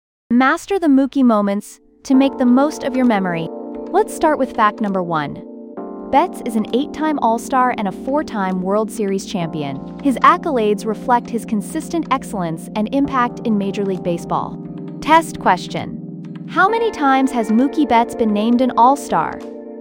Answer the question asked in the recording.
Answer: Correct answer, 8.